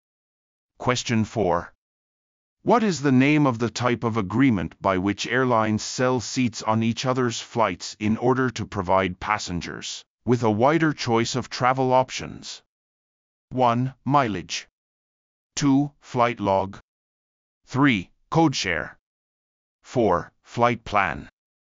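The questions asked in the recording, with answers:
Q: What is the name of the type of agreement by which airlines sell seats on each other's flights in order to provide passengers with a wider choice of travel options?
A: 3: Codeshare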